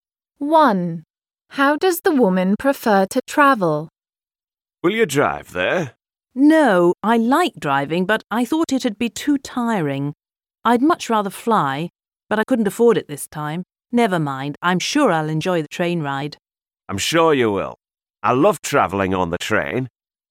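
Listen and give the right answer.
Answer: By plane (she'd rather fly)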